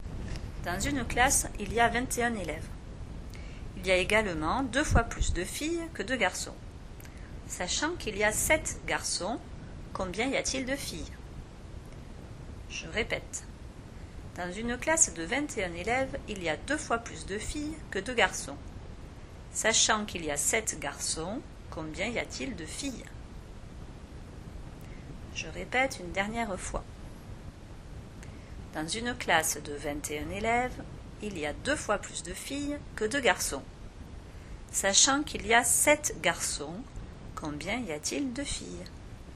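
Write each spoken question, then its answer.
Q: Sachant qu'il y a 7 garçons, combien y a-t-il de filles?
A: 14 filles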